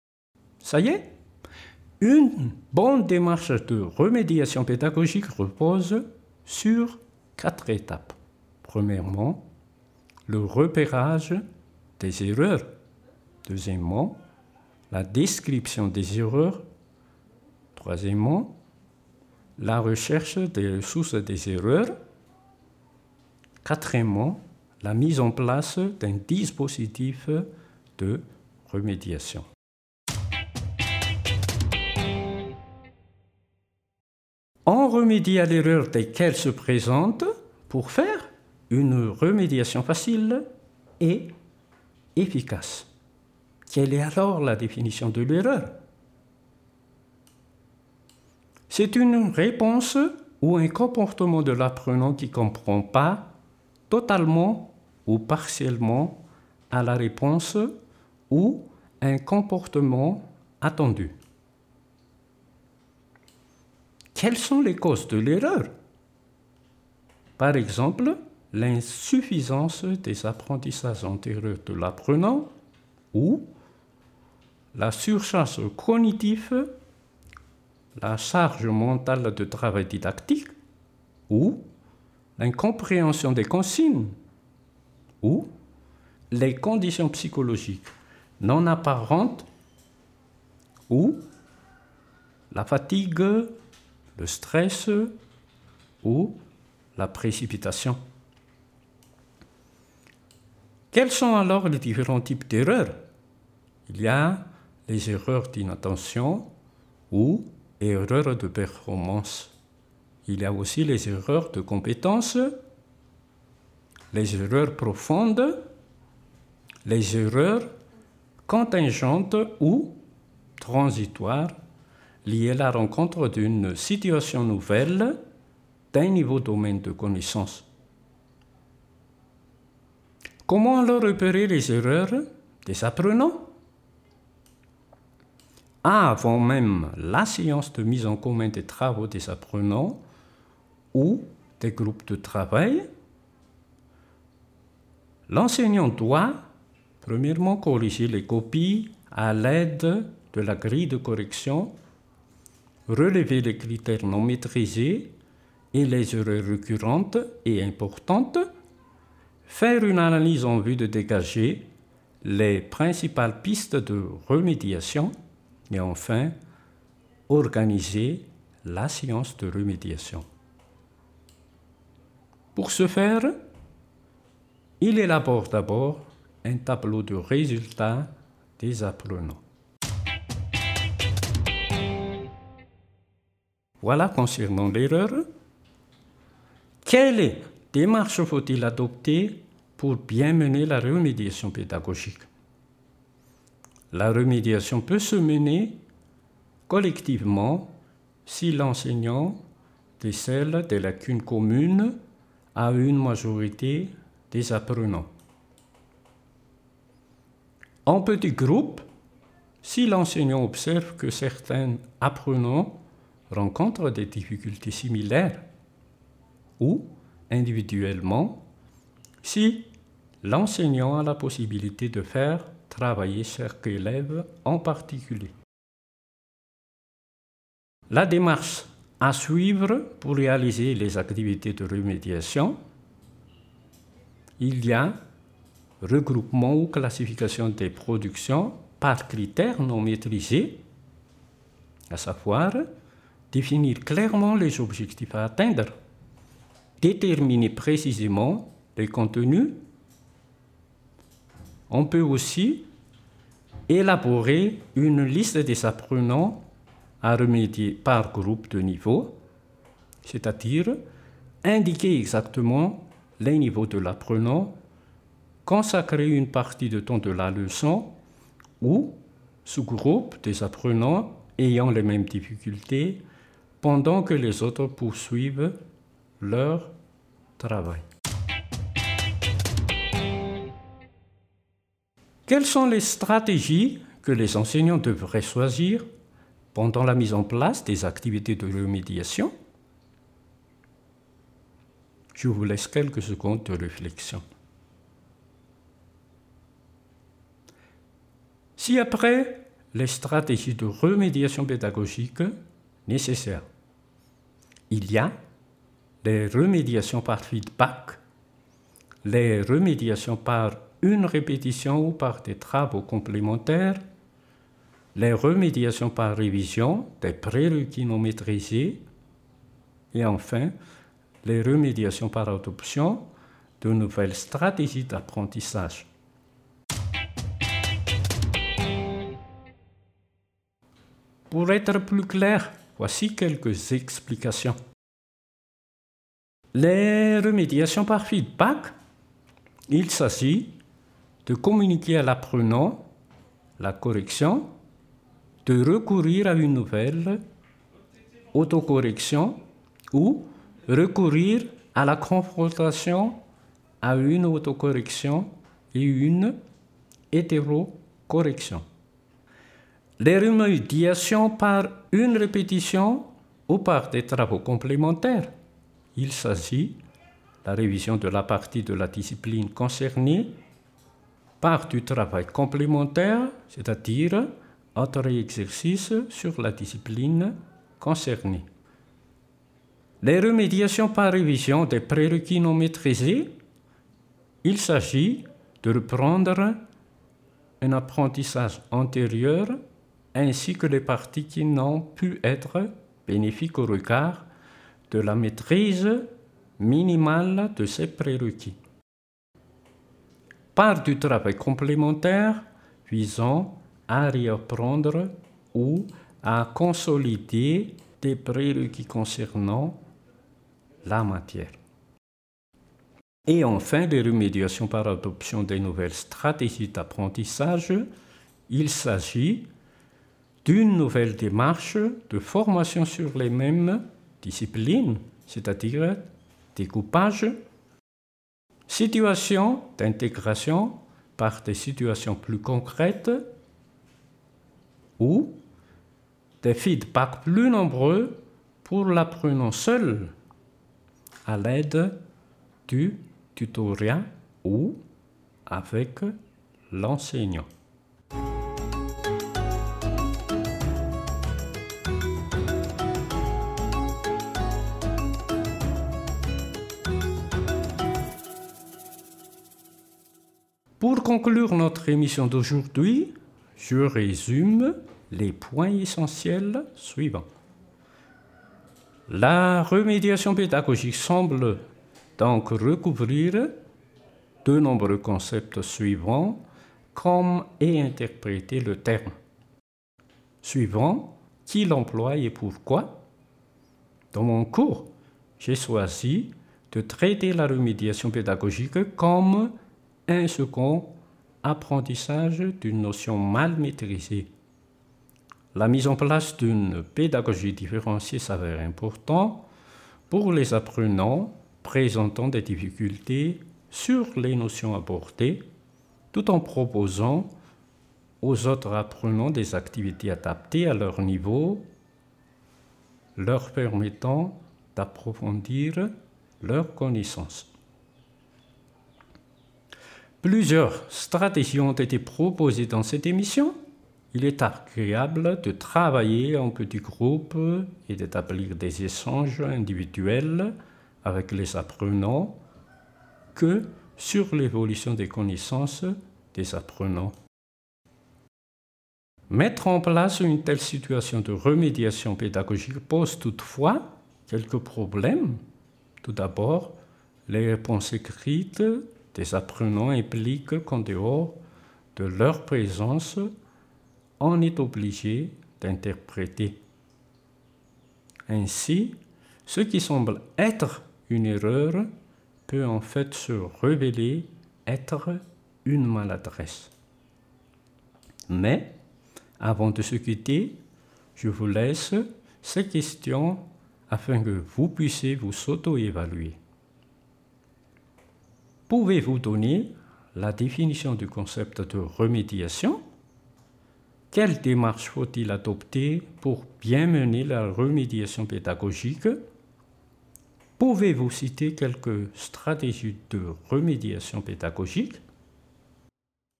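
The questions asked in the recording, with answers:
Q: Pouvez-vous citer quelques stratégies de remédiation pédagogique?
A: Remédiation par feedback, par répétition ou travaux complémentaires, par révision des prérequis non maîtrisés, par adoption de nouvelles stratégies d'apprentissage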